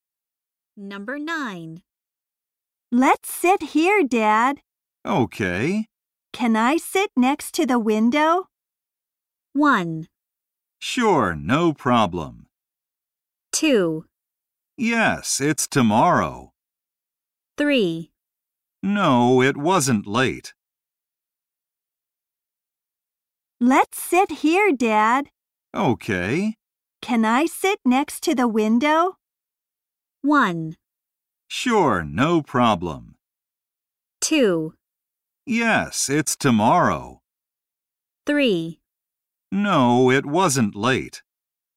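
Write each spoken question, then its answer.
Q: Can I sit next to the window?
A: 1: Sure, no problem.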